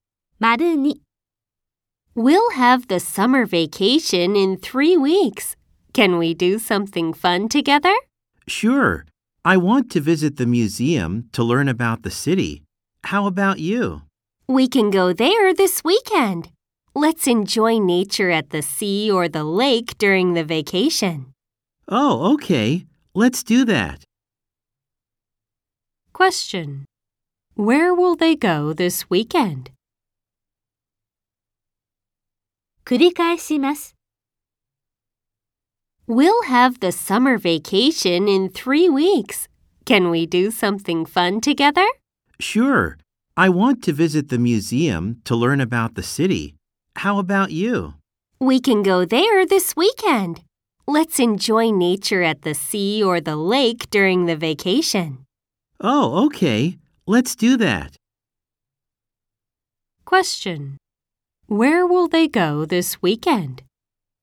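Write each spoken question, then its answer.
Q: Where will they go this weekend?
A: To the museum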